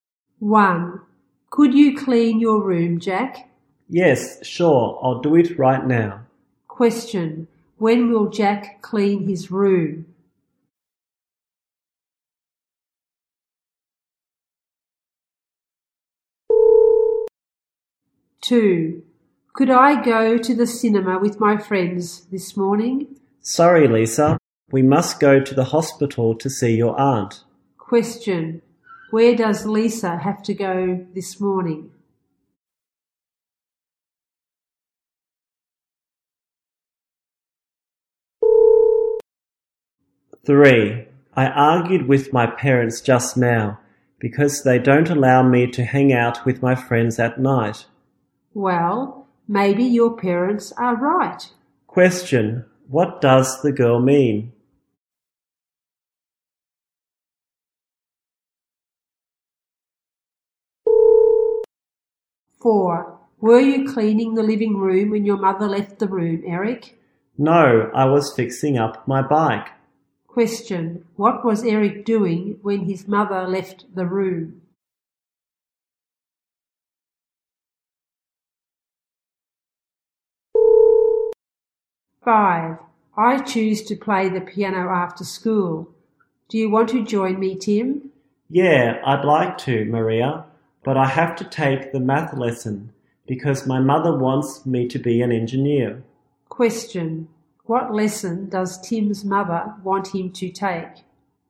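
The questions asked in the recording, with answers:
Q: When will Jack clean his room?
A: Right now

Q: Where does Lisa have to go this morning?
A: To the hospital

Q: What does the girl mean?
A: The parents may be right

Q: What was Eric doing when his mother left the room?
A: Fixing up his bike

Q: What lesson does Tim's mother want him to take?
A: The math lesson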